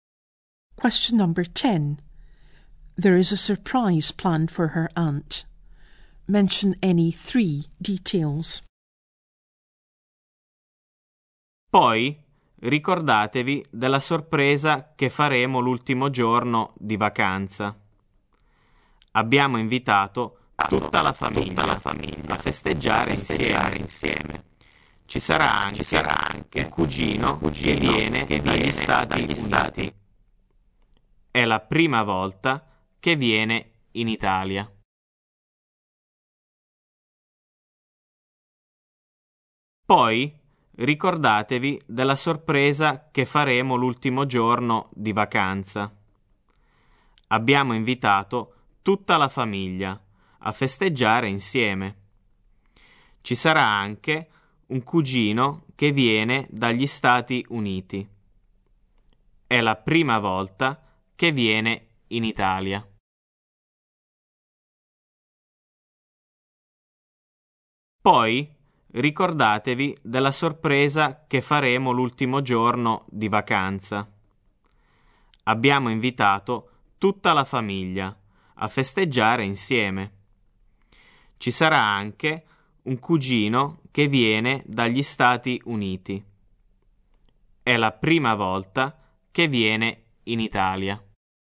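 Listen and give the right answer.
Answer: It's on the last day of the holiday; the whole family is invited to celebrate together; a cousin is coming from the United States; it's his first time in Italy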